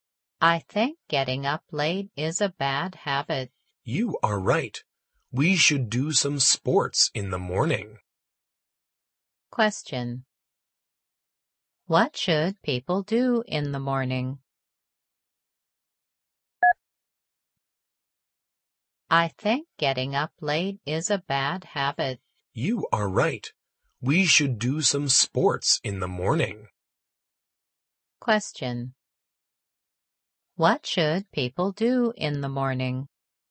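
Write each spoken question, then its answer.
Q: What should people do in the morning?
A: Do some sports.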